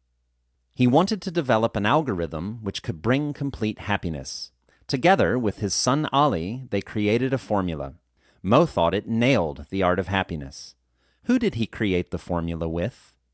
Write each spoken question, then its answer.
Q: Who did he create the formula with?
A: He created the formula with his son Ali.